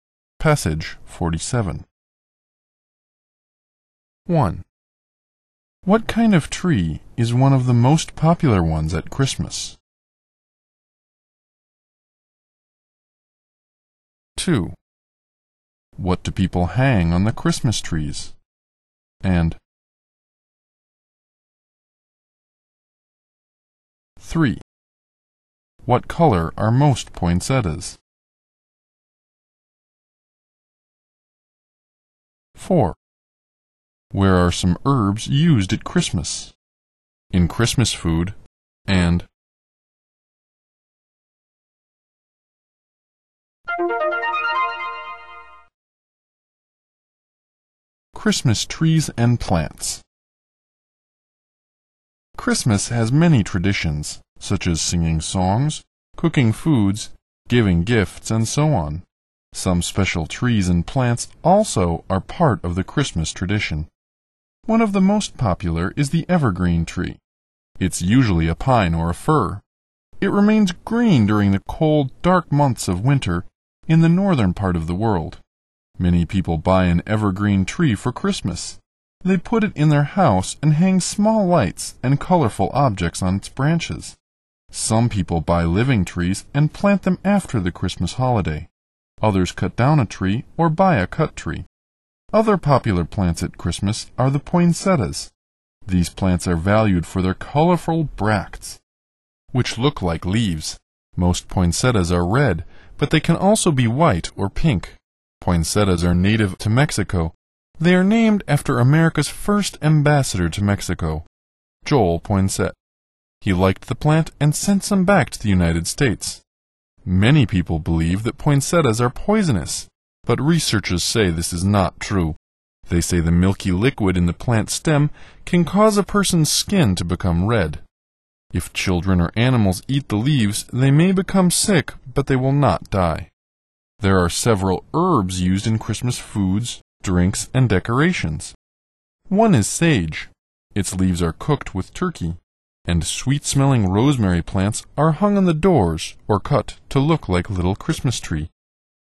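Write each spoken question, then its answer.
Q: What kind of tree is one of the most popular ones at Christmas?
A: The evergreen tree

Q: What do people hang on the Christmas trees?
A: Small lights and colorful objects

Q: What color are most poinsettias?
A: Red

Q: Where are some herbs used at Christmas?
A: In Christmas foods, drinks, and decorations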